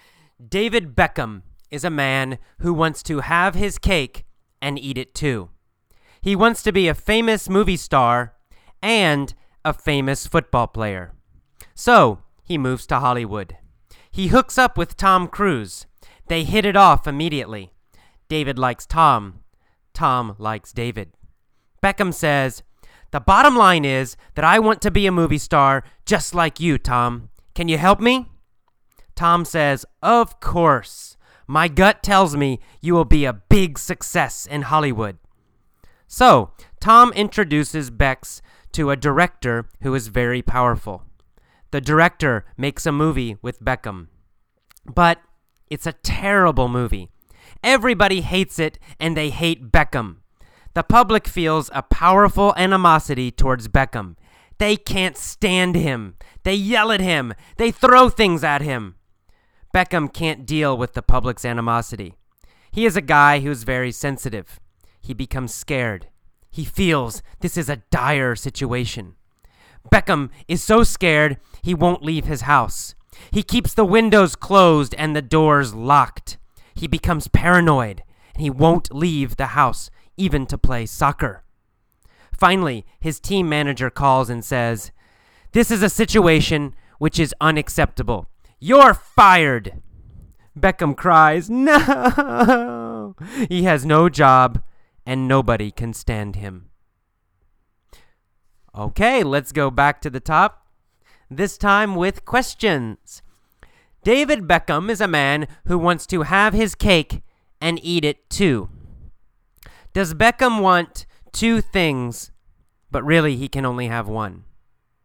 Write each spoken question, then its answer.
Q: Does Beckham want two things, but really he can only have one?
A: Yes, that's the exact meaning of to have his cake and eat it too.